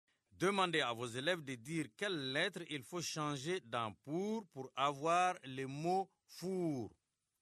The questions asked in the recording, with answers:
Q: Demandez à vos élèves de dire quelle lettre il faut changer dans « pour avoir le mot « four ».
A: Monsieur, j'efface le P et j'écris un F.